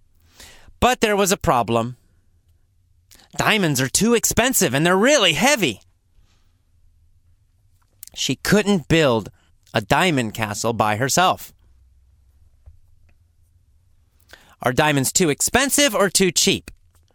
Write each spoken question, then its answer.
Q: Are diamonds too expensive or too cheap?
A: Well, of course, they're too expensive.